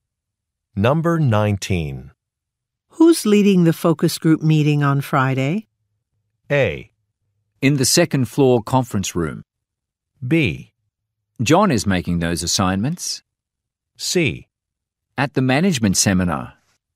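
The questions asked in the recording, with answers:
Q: Who's leading the focus group meeting on Friday?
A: B: John is making those assignments.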